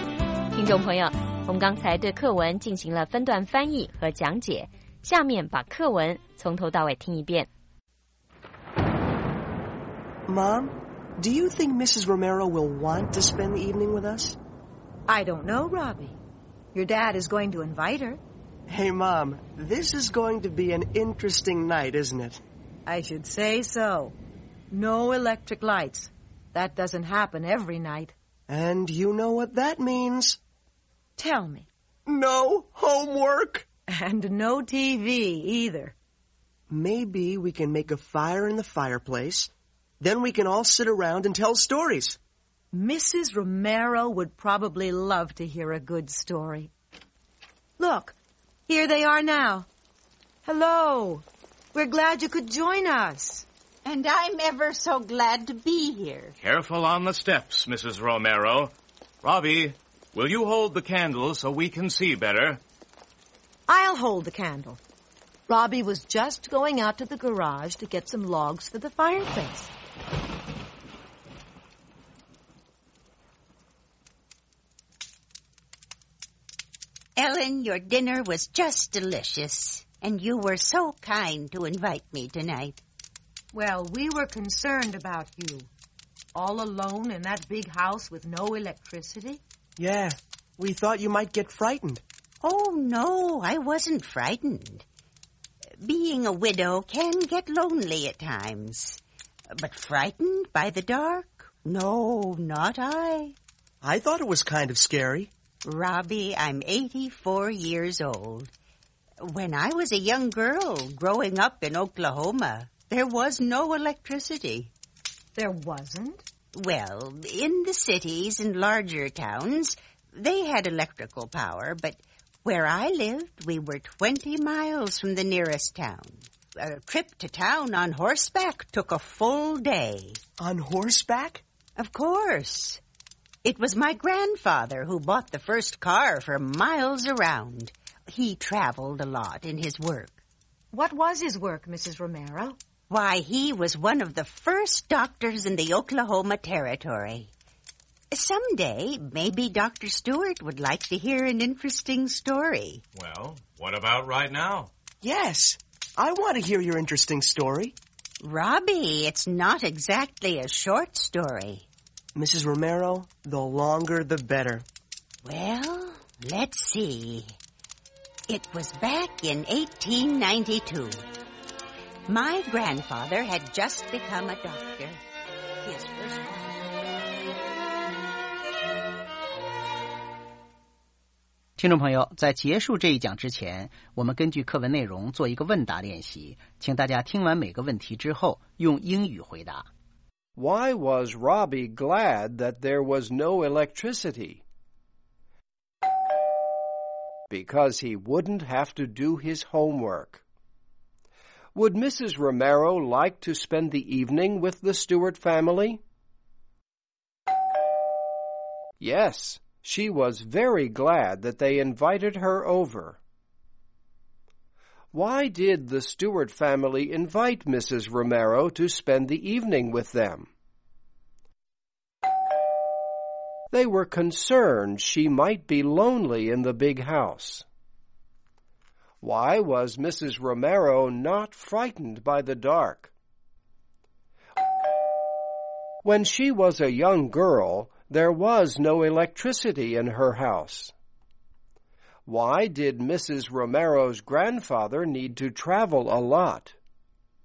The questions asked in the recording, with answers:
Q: Why was Robbie glad that there was no electricity?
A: Because he wouldn't have to do his homework.

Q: Would Mrs. Romero like to spend the evening with the Stewart family?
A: Yes, she was very glad that they invited her over.

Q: Why did the Stewart family invite Mrs. Romero to spend the evening with them?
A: They were concerned she might be lonely in the big house.

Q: Why did Mrs. Romero's grandfather need to travel a lot?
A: Because he was a doctor in the Oklahoma Territory.